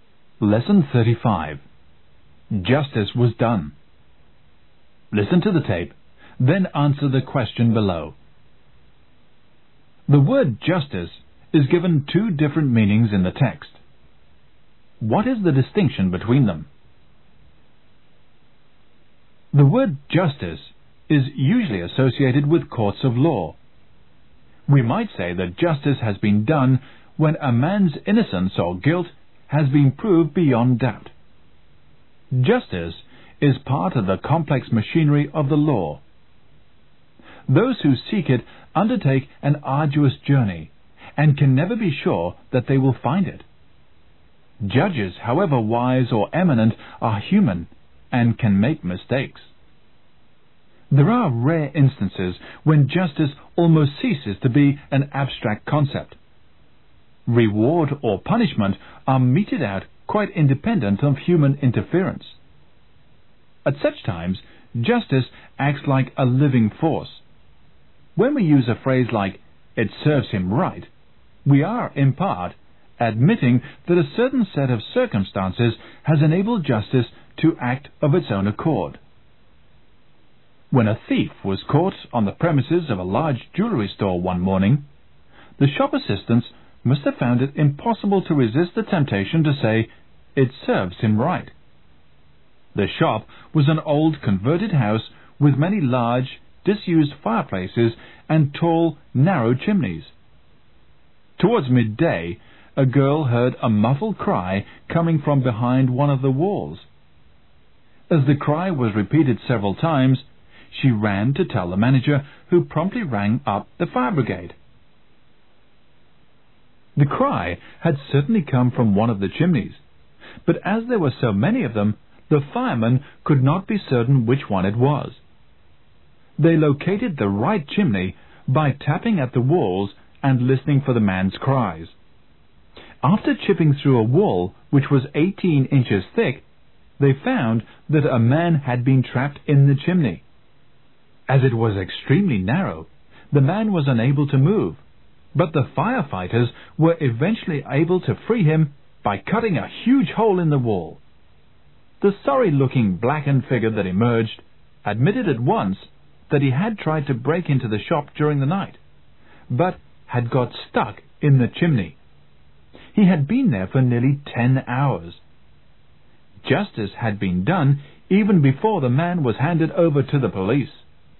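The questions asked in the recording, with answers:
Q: The word justice is given two different meanings in the text. What is the distinction between them?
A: Justice in courts of law, decided by humans, versus justice acting of its own accord, independent of human interference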